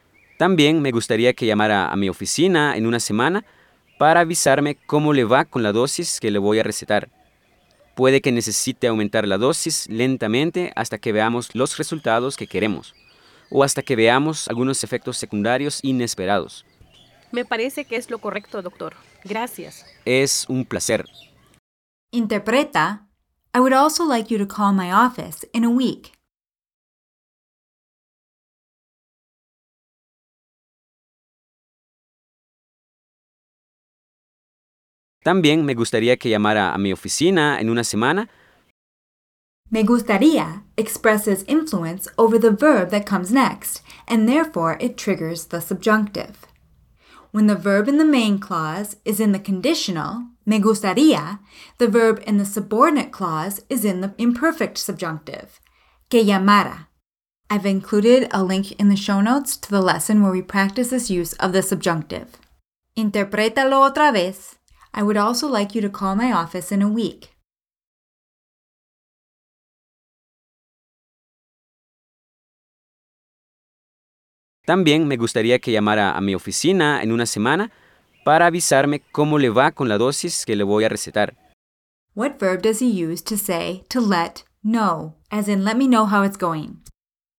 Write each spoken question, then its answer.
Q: What verb does he use to say to let know, as in let me know how it's going?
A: Avisar.